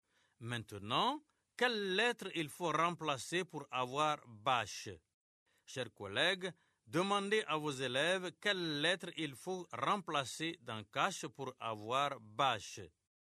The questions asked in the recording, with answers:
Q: Maintenant, quelle lettre il faut remplacer pour avoir bâche?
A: Monsieur, c'est la lettre C.